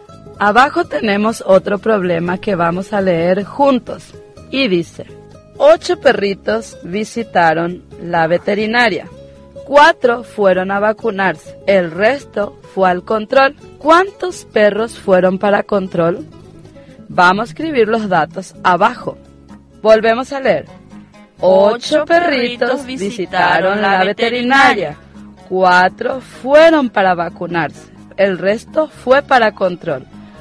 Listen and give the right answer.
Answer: 4 perritos fueron para control.